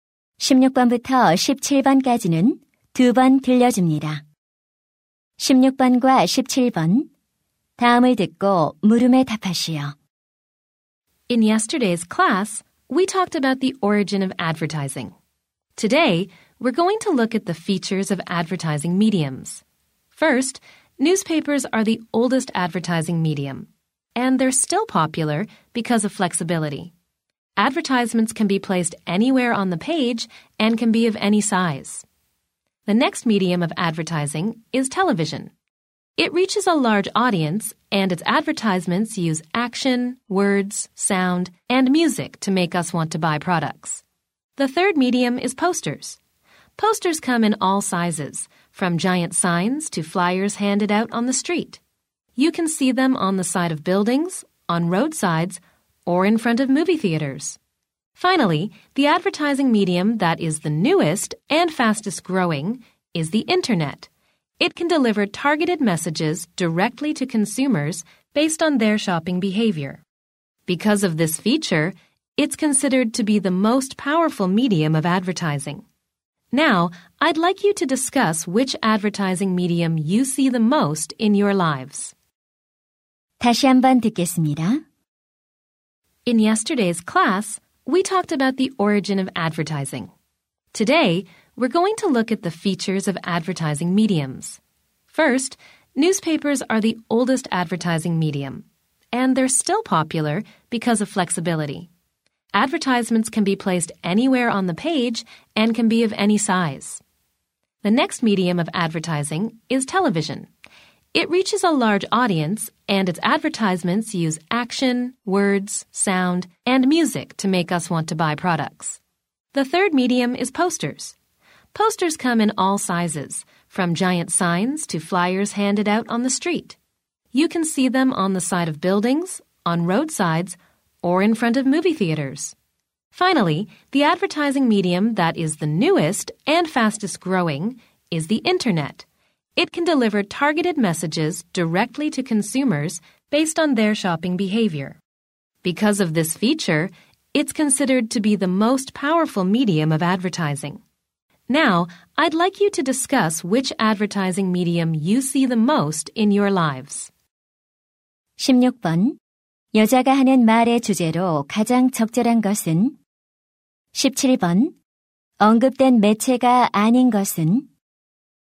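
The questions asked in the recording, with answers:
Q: 여자가 하는 말의 주제로 가장 적절한 것은?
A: 광고 매체들의 특징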